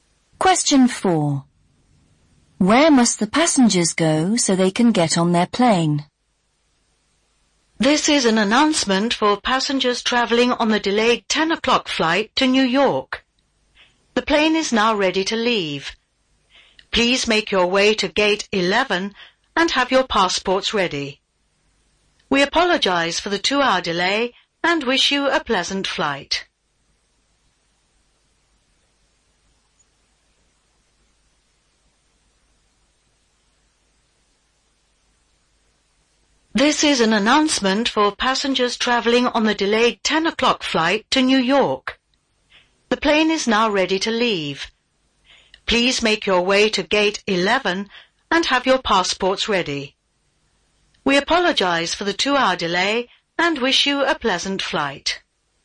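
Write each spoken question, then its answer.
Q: Where must the passengers go so they can get on their plane?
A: Gate 11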